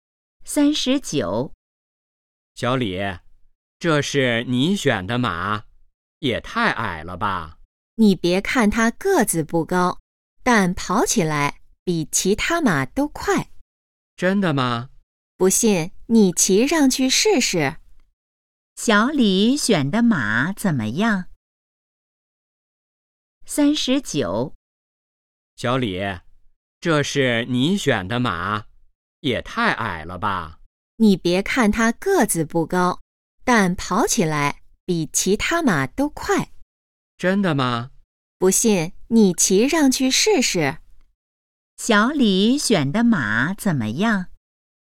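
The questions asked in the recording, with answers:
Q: 小李选的马怎么样?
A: 个子不高,但跑得比其他马快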